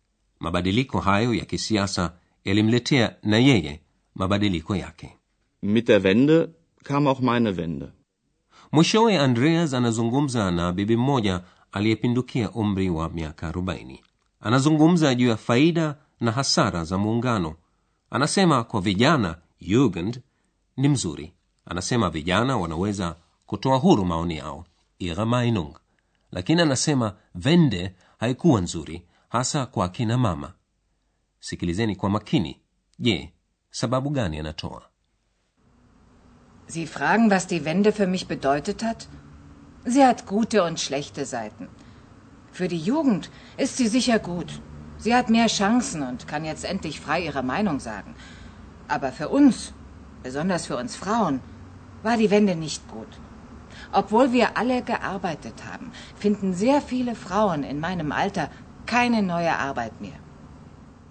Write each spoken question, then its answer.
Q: je sababu gani anatoa.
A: Lakini upande mbaya umewaathiri hasa akina mama wa umri wake katika ujerumani mashariki karibu wanawake wote walikuwa na kazi lakini sasa akina mama wengi wa umri wake hawawezi kupata kazi nyingine